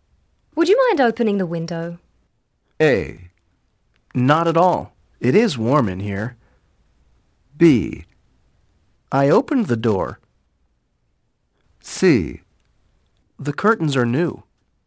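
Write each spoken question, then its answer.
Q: Would you mind opening the window?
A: A: Not at all. It is warm in here.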